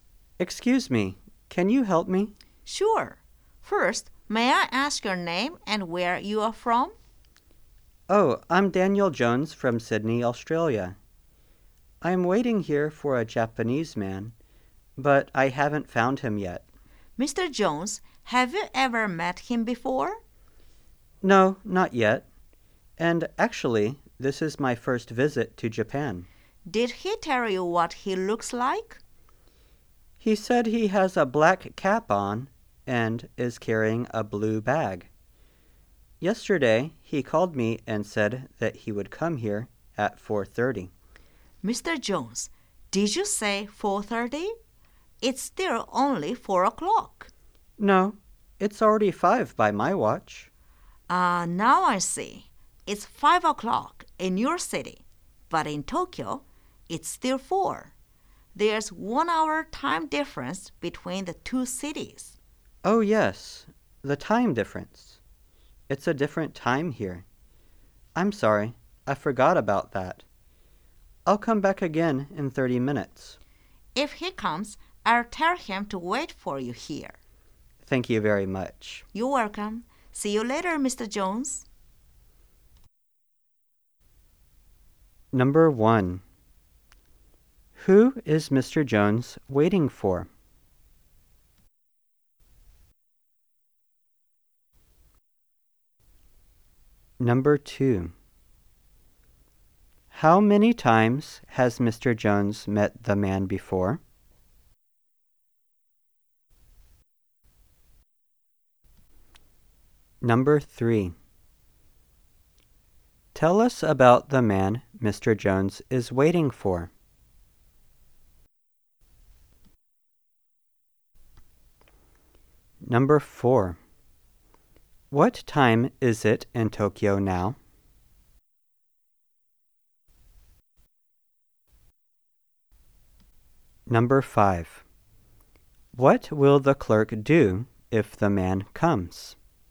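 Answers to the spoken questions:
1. A Japanese man
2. Never (not yet)
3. He is Japanese, has a black cap on and is carrying a blue bag
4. 4 o'clock
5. Tell him to wait for Mr. Jones there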